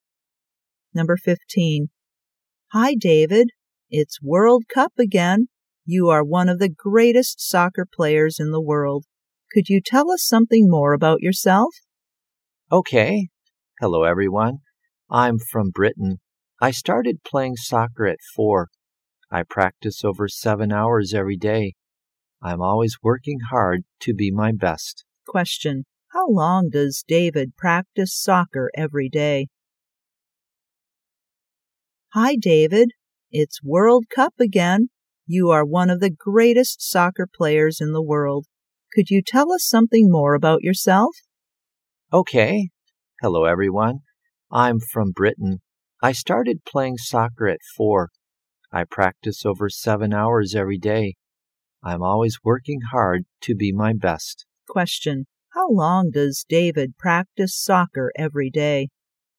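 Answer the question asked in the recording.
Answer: Over 7 hours.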